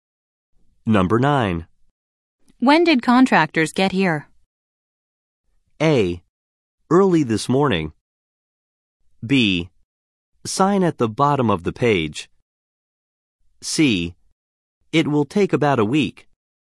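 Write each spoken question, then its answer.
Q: When did contractors get here?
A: A: Early this morning.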